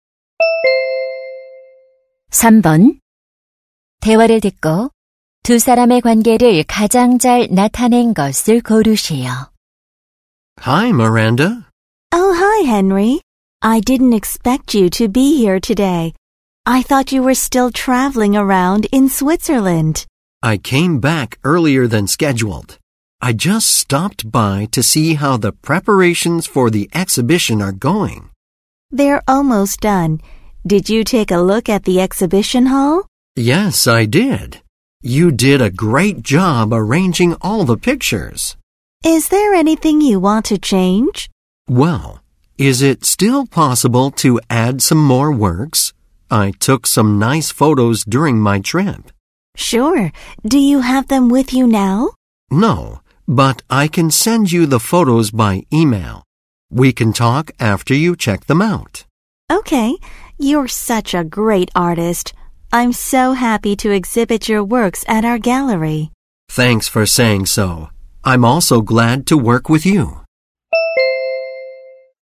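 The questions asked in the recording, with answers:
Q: 대화를 듣고 두 사람의 관계를 가장 잘 나타낸 것을 고르세요.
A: 사진작가 – 갤러리 전시 담당자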